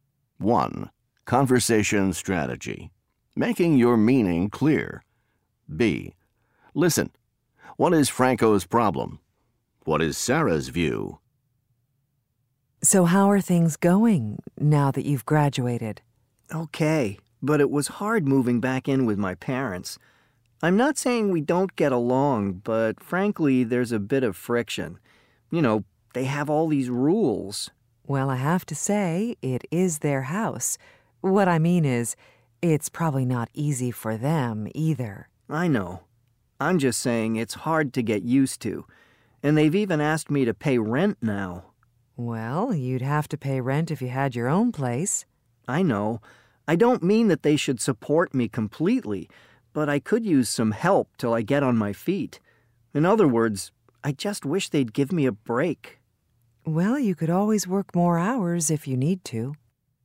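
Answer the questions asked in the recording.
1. Living with his parents after graduating is hard: there's friction over their rules, and they want him to pay rent.
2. It's their house, and it's probably not easy for them either; he'd have to pay rent anyway and could work more hours.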